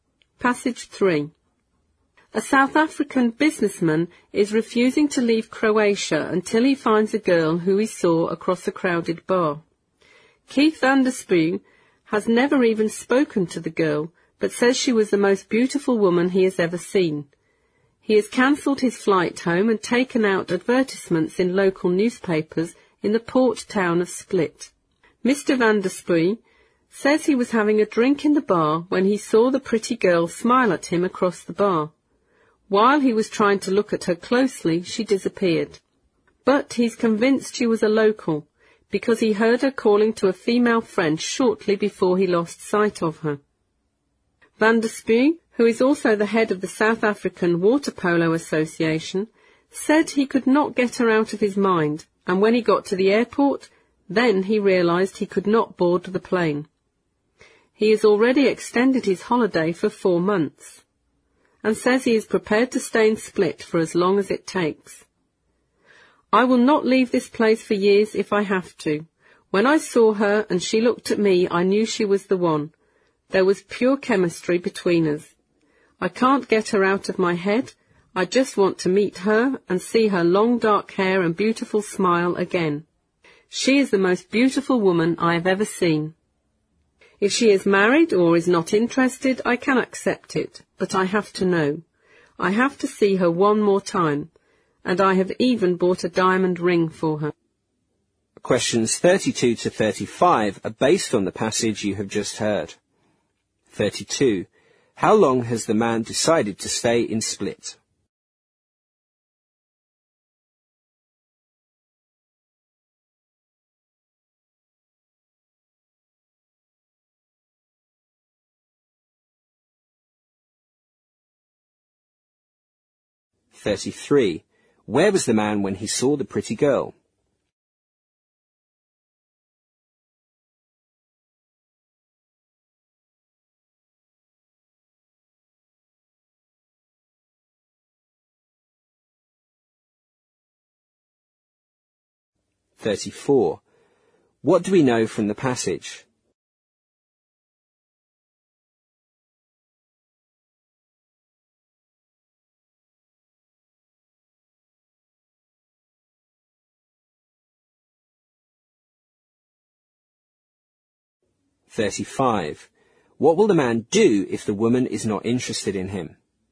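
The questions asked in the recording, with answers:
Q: How long has the man decided to stay in Split?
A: As long as it takes to find the girl

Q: Where was the man when he saw the pretty girl?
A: In a bar

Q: What will the man do if the woman is not interested in him?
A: Accept it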